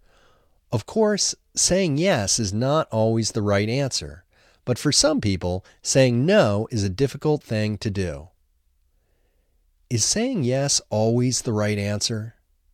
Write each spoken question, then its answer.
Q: Is saying yes always the right answer?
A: No, of course, saying yes is not always the right answer.